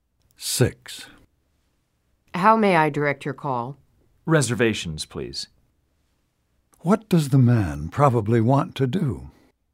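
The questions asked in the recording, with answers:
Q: What does the man probably want to do?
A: Make a reservation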